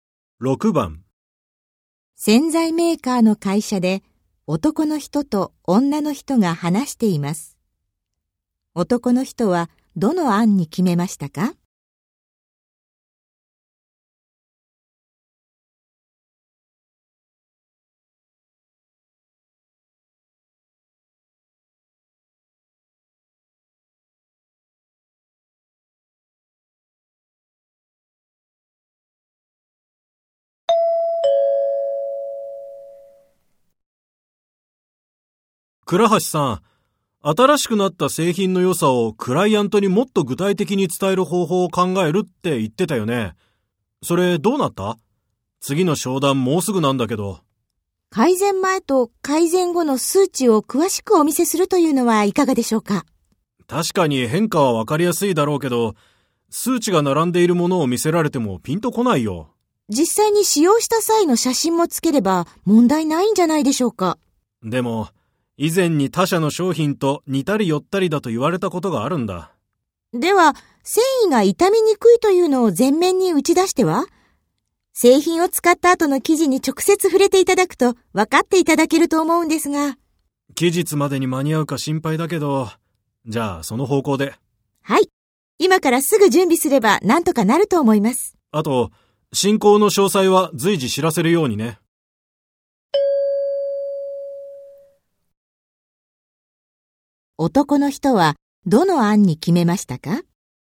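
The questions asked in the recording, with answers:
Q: 男の人はどの案に決めましたか?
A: 繊維が傷みにくいことを前面に出し、使用後の生地に直接触れてもらう案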